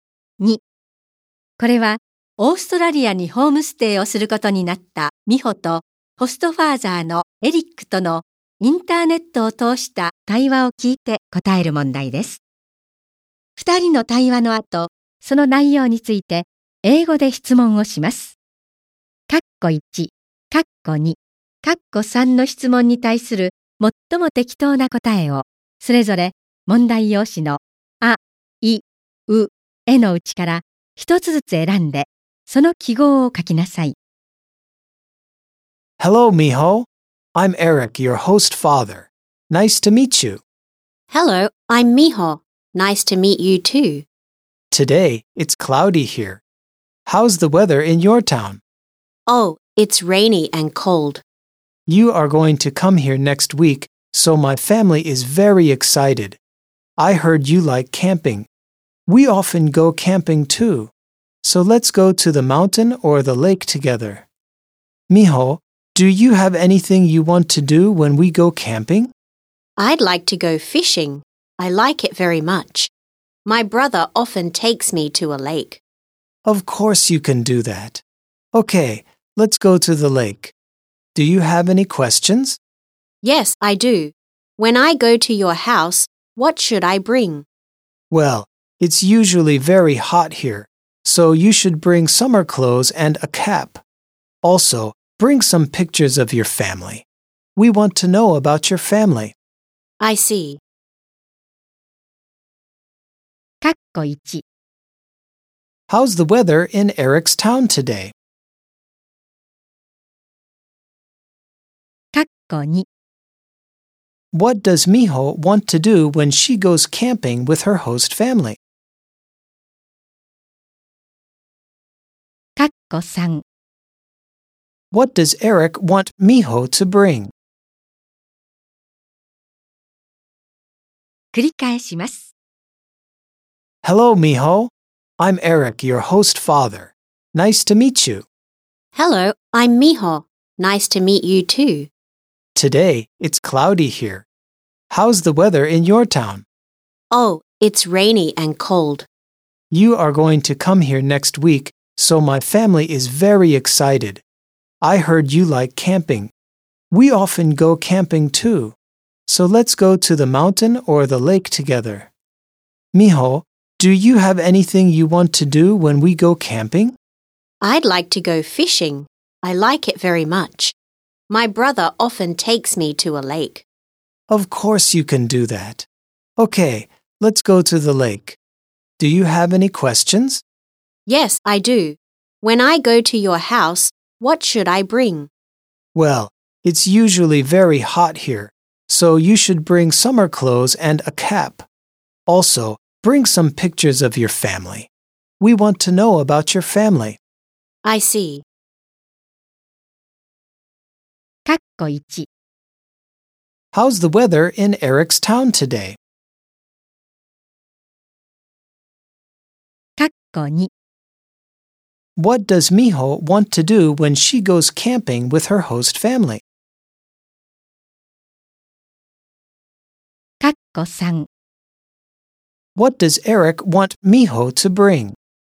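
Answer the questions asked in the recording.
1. It's cloudy.
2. She wants to go fishing.
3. Summer clothes, a cap, and pictures of her family.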